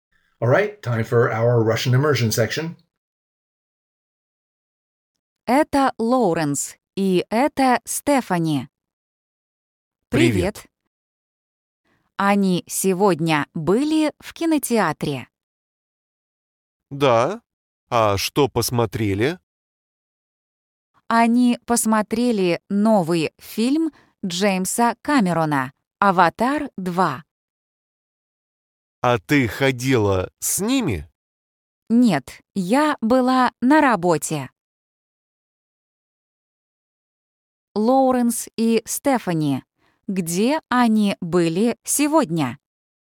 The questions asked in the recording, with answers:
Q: Лоуренс и Стефани, где они были сегодня?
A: В кинотеатре.